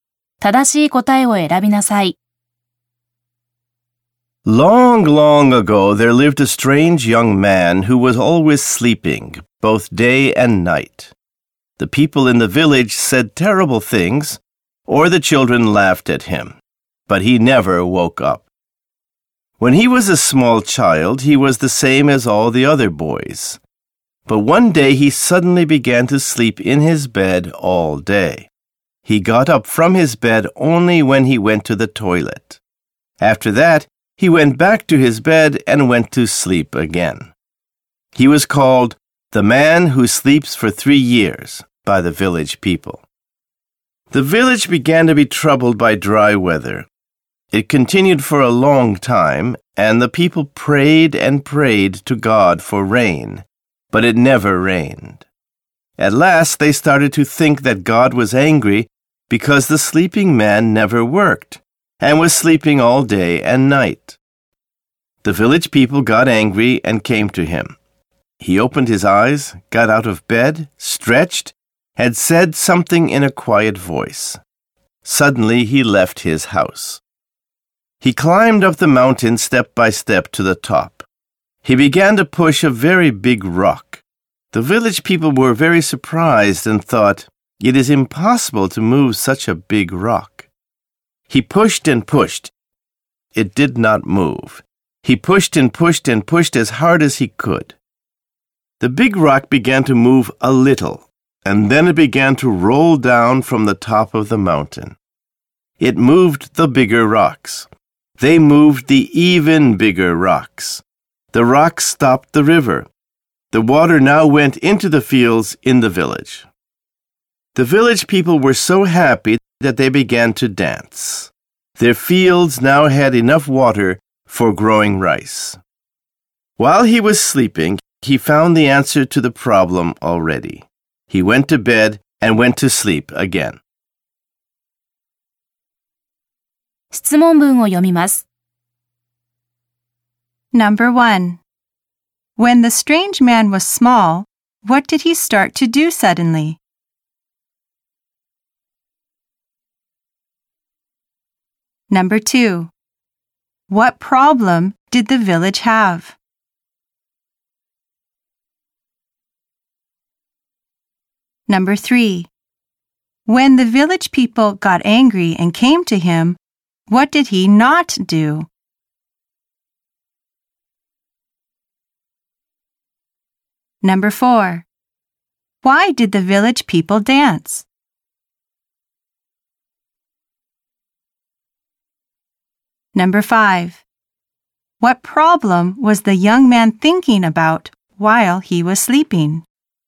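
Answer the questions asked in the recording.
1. He began to sleep in his bed all day.
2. Dry weather; it never rained.
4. Because water went into their fields, so they had enough water to grow rice.
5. How to get water for the village during the dry weather.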